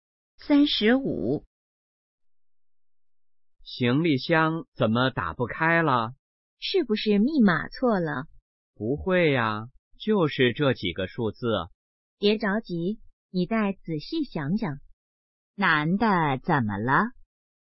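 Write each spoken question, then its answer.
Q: 男的怎么了?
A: 行李箱打不开了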